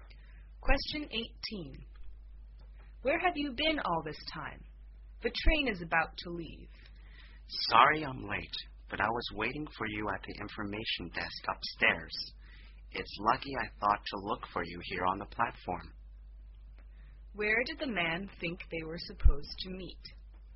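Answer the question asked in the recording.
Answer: At the information desk upstairs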